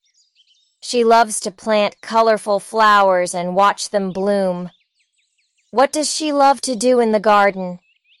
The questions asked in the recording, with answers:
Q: What does she love to do in the garden?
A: She loves to plant flowers.